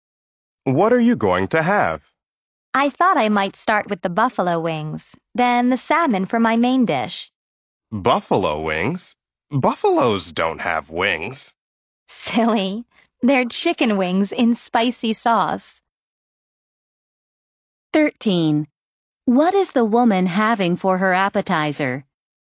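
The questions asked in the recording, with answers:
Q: What is the woman having for her appetizer?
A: Buffalo wings (chicken wings in spicy sauce)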